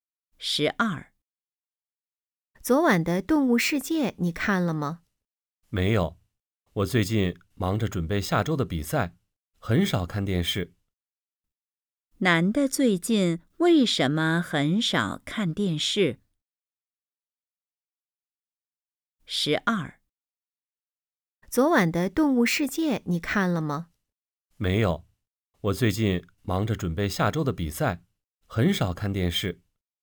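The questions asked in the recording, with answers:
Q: 男的最近为什么很少看电视?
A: 忙着准备下周的比赛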